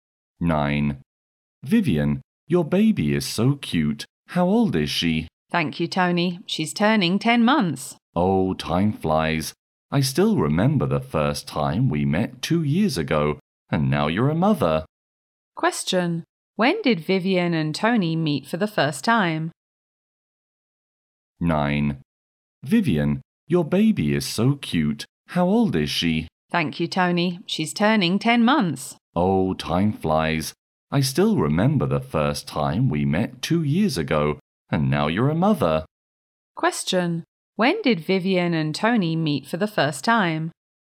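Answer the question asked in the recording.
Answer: 2 years ago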